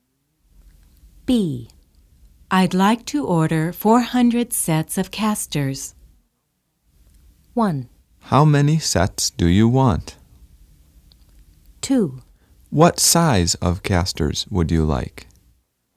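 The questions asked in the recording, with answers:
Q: I'd like to order 400 sets of casters.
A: 2: What size of casters would you like?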